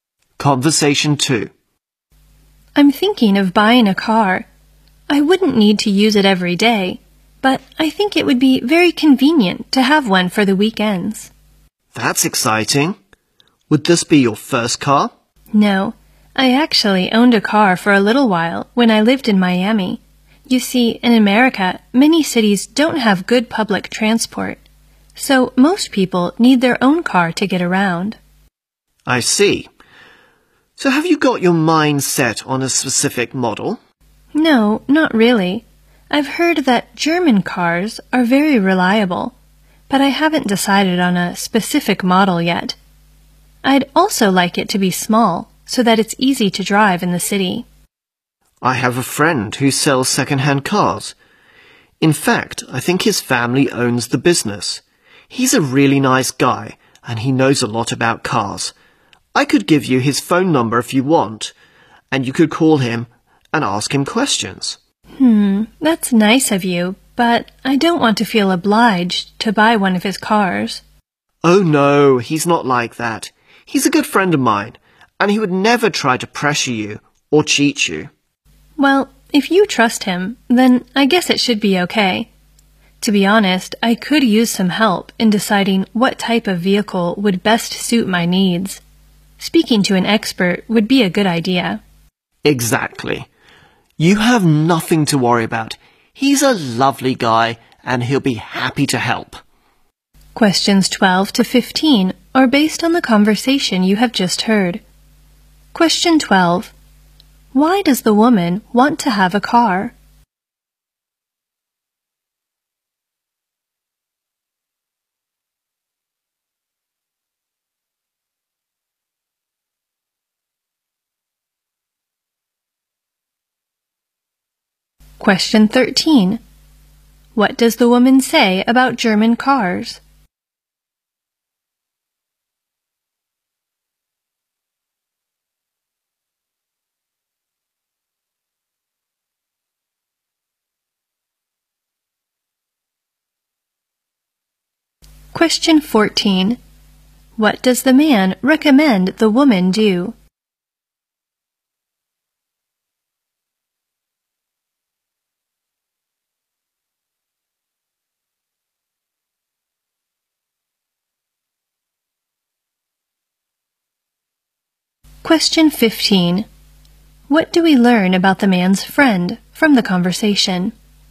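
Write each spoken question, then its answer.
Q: Why does the woman want to have a car?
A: It would be convenient for the weekends

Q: What does the woman say about German cars?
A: She has heard they are very reliable

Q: What does the man recommend the woman do?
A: Call his friend who sells second-hand cars for advice

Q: What do we learn about the man's friend from the conversation?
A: He is trustworthy and knows a lot about cars; he would never pressure or cheat her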